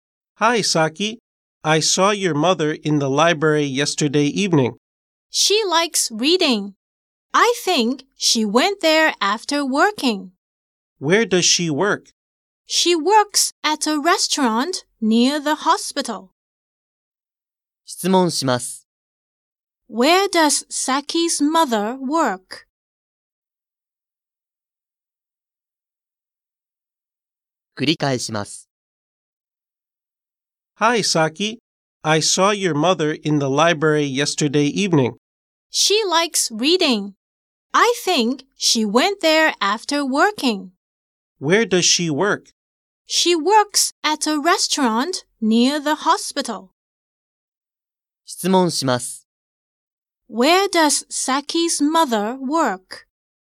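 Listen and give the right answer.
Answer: At a restaurant near the hospital.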